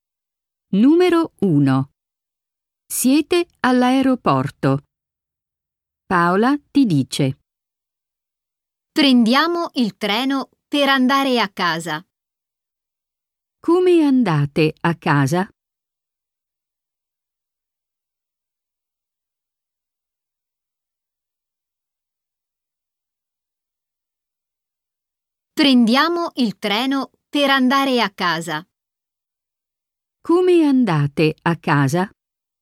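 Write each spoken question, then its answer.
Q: Come andate a casa?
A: In treno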